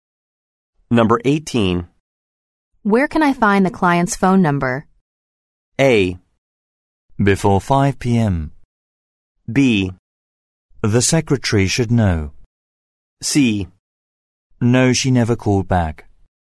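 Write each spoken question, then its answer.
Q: Where can I find the client's phone number?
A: B: The secretary should know.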